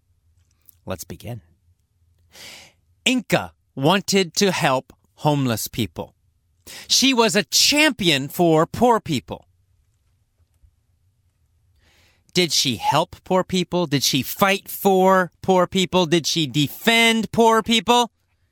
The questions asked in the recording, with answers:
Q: Did she help poor people?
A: Yes, that's right. She was a champion for poor people.